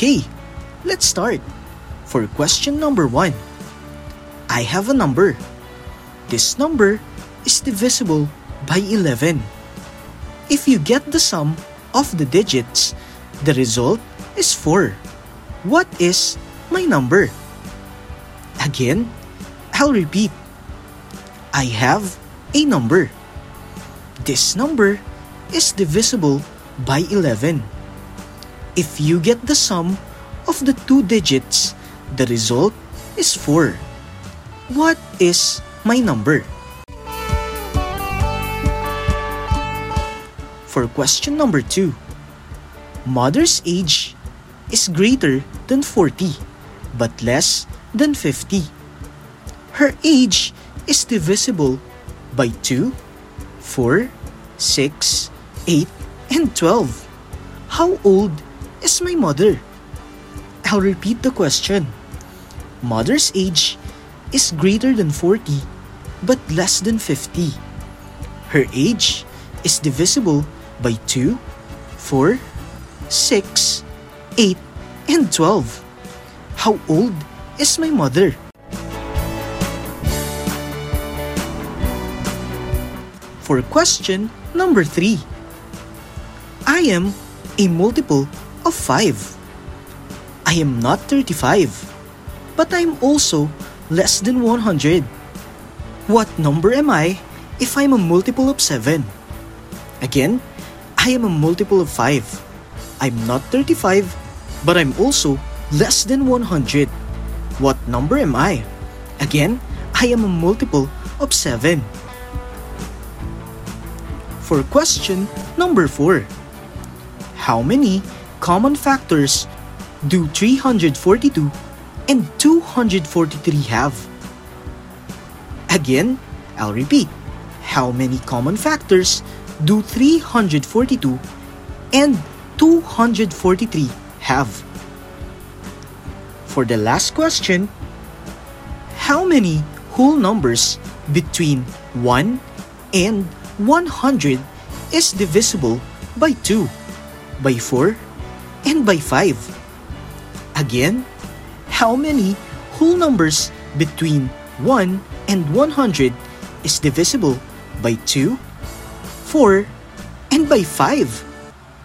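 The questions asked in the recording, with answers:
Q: What is my number?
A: 22

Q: How old is my mother?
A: 48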